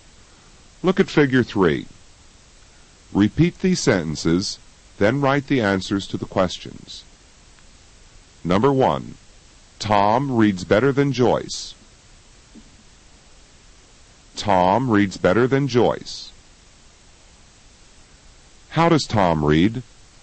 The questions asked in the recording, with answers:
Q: How does Tom read?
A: Tom reads better than Joyce.